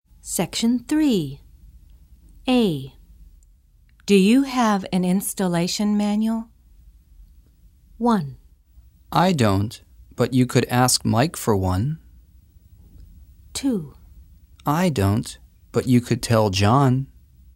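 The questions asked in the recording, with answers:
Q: Do you have an installation manual?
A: 1: I don't, but you could ask Mike for one.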